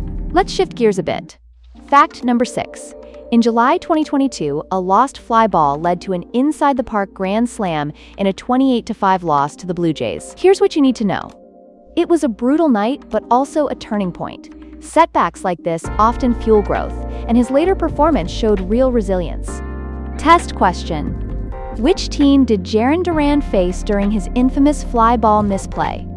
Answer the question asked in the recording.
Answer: Correct answer, Toronto Blue Jays.